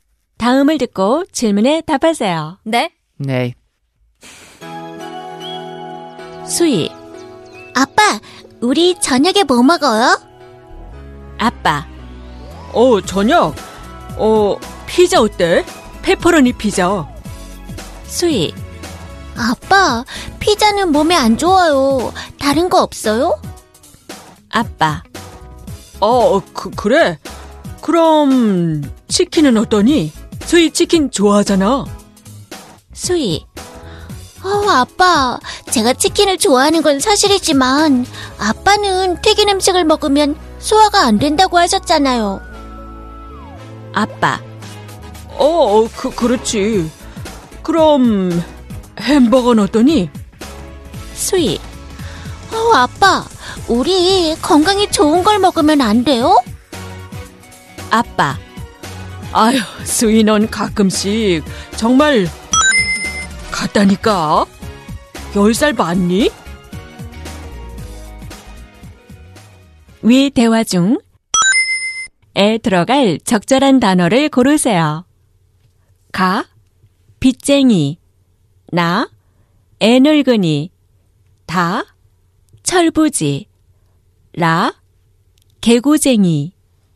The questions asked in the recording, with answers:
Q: 위 대화 중에 들어갈 적절한 단어를 고르세요.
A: 나, 애늙은이